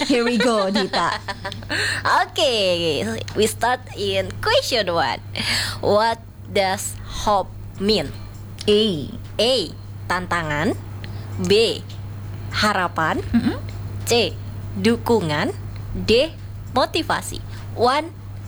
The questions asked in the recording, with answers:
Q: What does hope mean?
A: The answer is B.